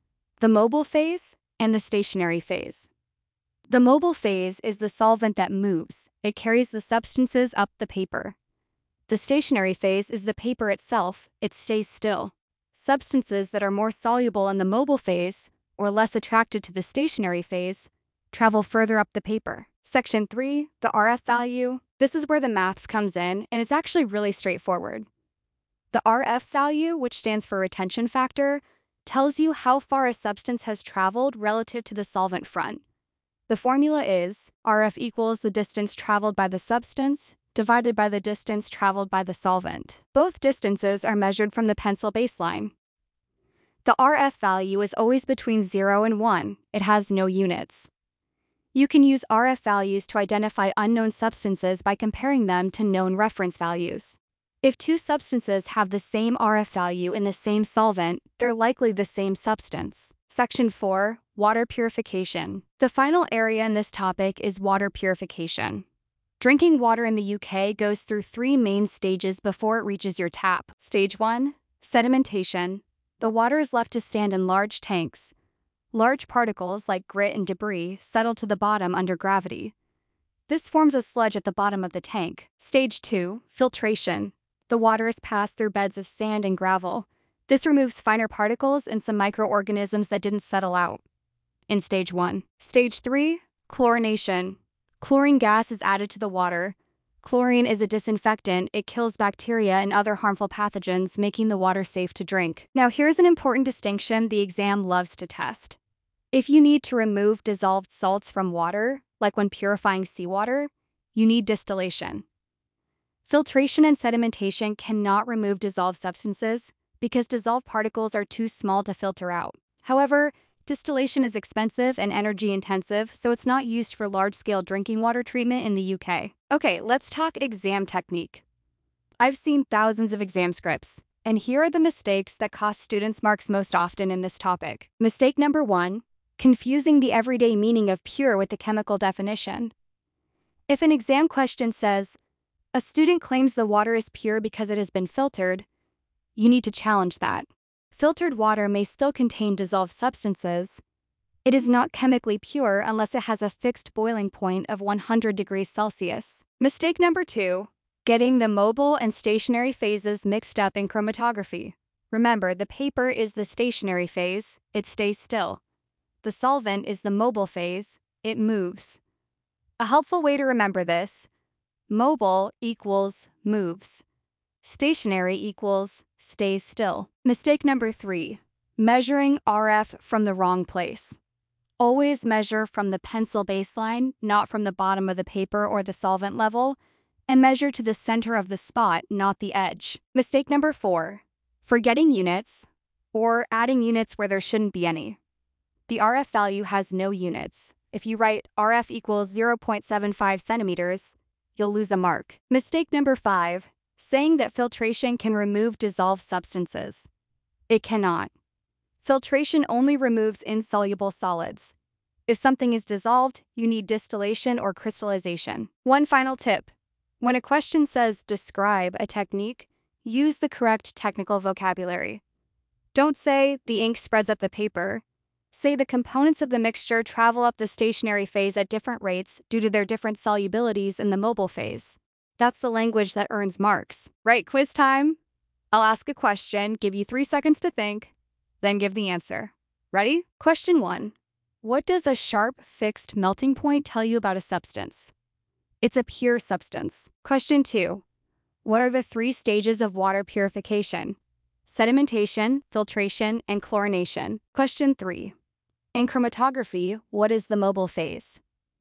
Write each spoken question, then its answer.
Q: In chromatography, what is the mobile phase?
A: The solvent? It moves.